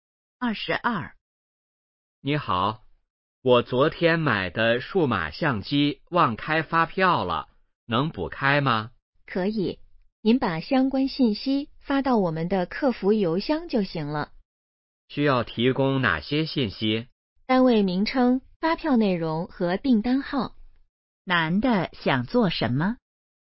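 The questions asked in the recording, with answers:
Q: 男的想做什么?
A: 补开发票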